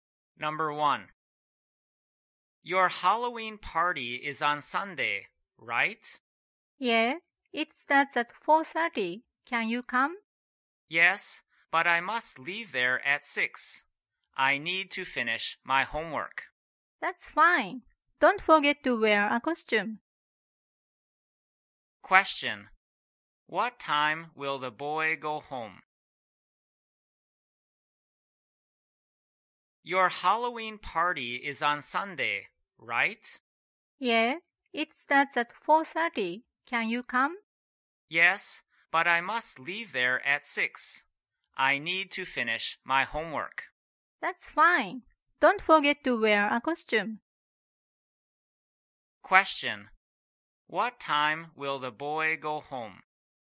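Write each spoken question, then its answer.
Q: What time will the boy go home?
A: At 6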